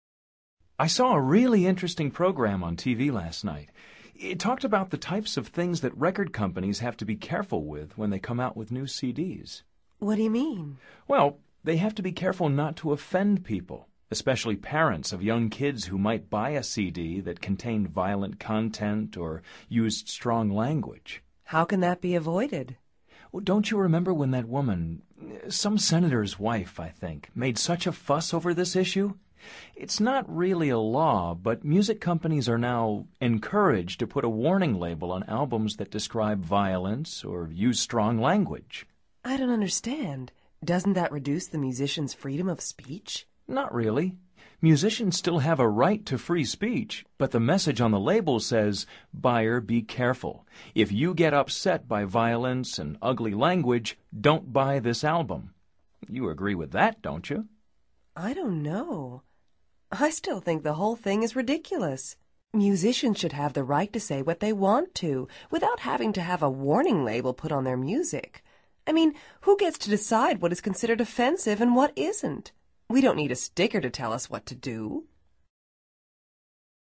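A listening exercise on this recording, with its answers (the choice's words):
Activity 99: Basándote en los comentarios anteriores, selecciona las opciones más adecuadas. Recuerda lo siguiente: opinions for = opiniones a favor; opinions against = opiniones en contra. Verifica luego las respuestas correctas.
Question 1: What is the main issue in dialogue #1?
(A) Offensive stickers on CDs.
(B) Putting warning labels on CDs.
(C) Musicians' recording rights.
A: Putting warning labels on CDs.

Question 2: What are the opinions for this issue?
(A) Buyers don't buy ugly-language CDs.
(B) Record companies offend people.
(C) Musicians' speech is not violent.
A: Buyers don't buy ugly-language CDs.

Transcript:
I saw a really interesting program on TV last night. It talked about the types of things that record companies have to be careful with when they come out with new CDs.
What do you mean?
Well, they have to be careful not to offend people – especially parents of young kids who might buy a CD that contained violent content or used strong language.
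How can that be avoided?
Well, don't you remember when that woman – some senator's wife, I think – made such a fuss over this issue? It's not really a law, but music companies are now encouraged to put a warning label on albums that describe violence or use strong language.
I don't understand. Doesn't that reduce the musicians' freedom of speech?
Not really. Musicians still have a right to free speech, but the message on the label says, "Buyer, be careful: If you get upset by violence and ugly language, don't buy this album." You agree with that, don't you?
I don't know. I still think the whole thing is ridiculous. Musicians should have the right to say what they want to without having to have a warning label put on their music. I mean, who gets to decide what is considered offensive and what isn't. We don't need a sticker to tell us what to do!

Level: Nivel Avanzado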